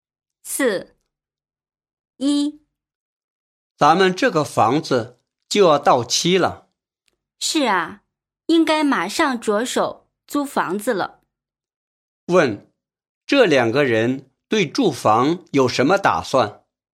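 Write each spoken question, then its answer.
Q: 问,这两个人对住房有什么打算?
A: 打算马上重新租房子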